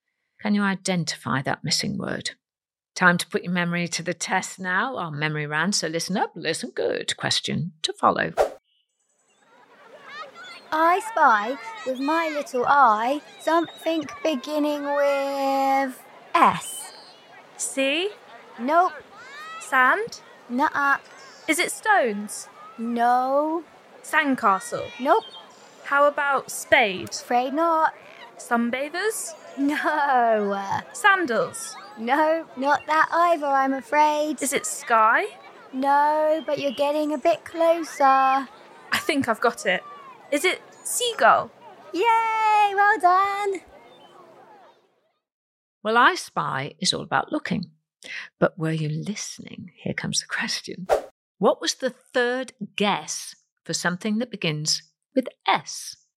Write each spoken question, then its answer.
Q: What was the third guess for something that begins with S?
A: Well, I mentioned quite a few S words, but the one I was looking for was stones.